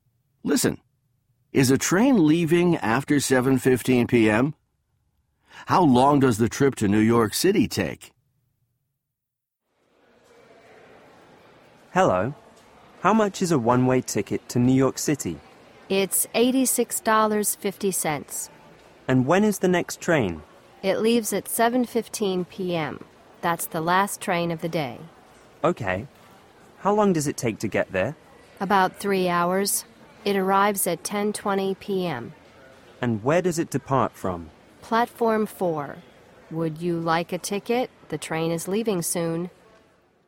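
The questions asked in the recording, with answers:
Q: Is a train leaving after 7:15 p.m.?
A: No, 7:15 p.m. is the last train of the day.

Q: How long does the trip to New York City take?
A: About 3 hours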